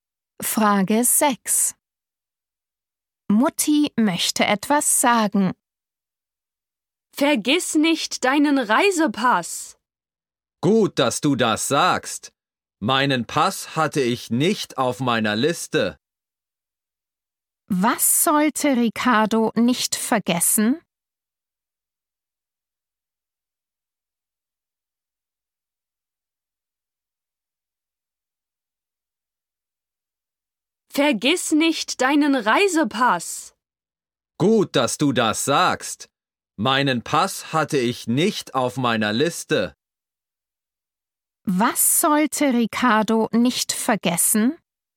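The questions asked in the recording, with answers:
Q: Was sollte Ricardo nicht vergessen?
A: seinen Reisepass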